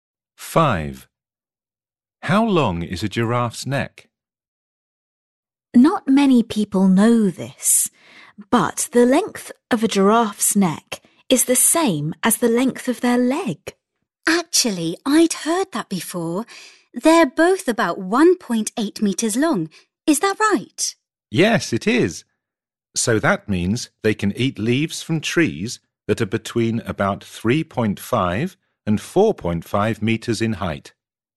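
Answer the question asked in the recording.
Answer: About 1.8 metres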